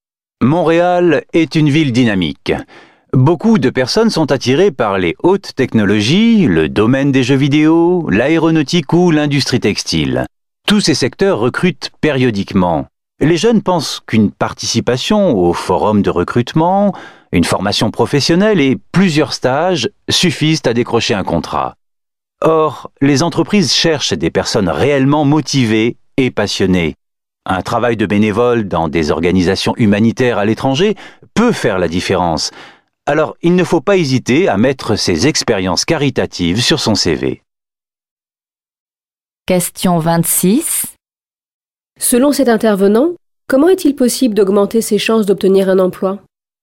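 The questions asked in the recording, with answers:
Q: Selon cet intervenant, comment est-il possible d'augmenter ses chances d'obtenir un emploi ?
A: En mentionnant sur son CV des expériences de bénévolat dans des organisations humanitaires à l'étranger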